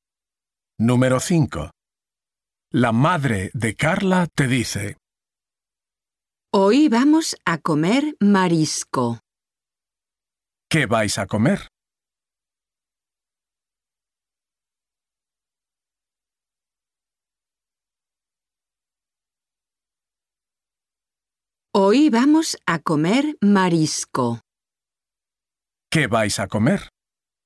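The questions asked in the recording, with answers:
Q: ¿Qué vais a comer?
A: Marisco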